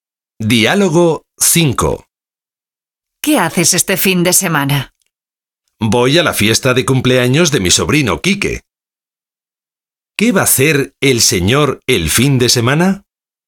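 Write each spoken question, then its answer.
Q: ¿Qué va a hacer el señor el fin de semana?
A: Ir a la fiesta de cumpleaños de su sobrino Quique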